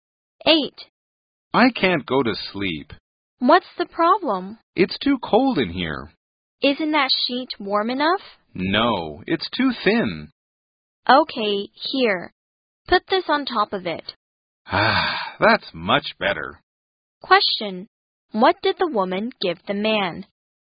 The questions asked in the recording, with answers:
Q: Question, what did the woman give the man?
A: a blanket